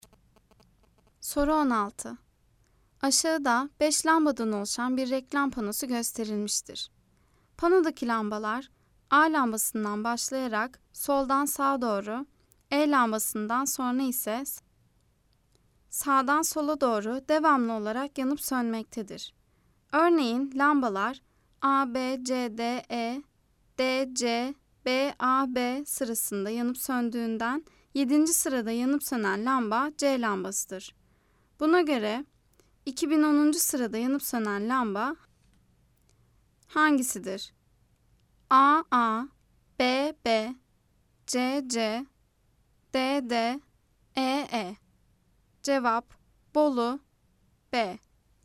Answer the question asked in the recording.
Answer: Cevap Bolu B.